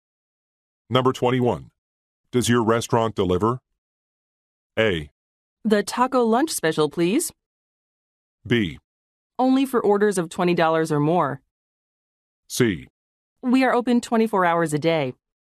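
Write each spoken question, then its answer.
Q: Does your restaurant deliver?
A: B: Only for orders of $20 or more.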